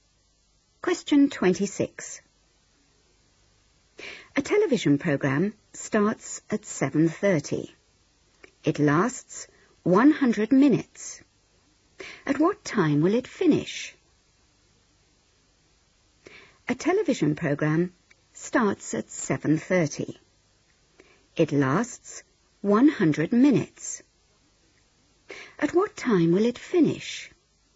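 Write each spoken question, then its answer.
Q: It lasts 100 minutes. At what time will it finish?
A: 9:10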